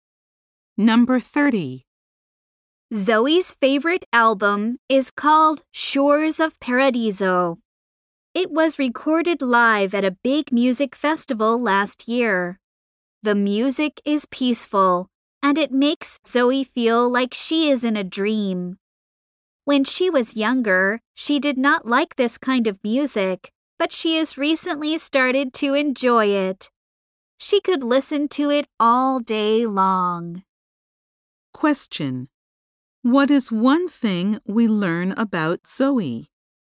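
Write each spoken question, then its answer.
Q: What is one thing we learn about Zoe?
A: She has recently started enjoying a kind of music she didn't like before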